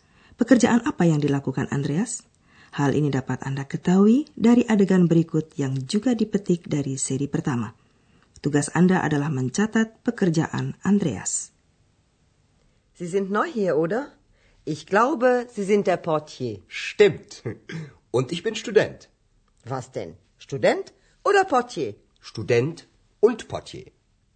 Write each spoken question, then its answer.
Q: Pekerjaan apa yang dilakukan Andreas?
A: Andreas bekerja sebagai portier.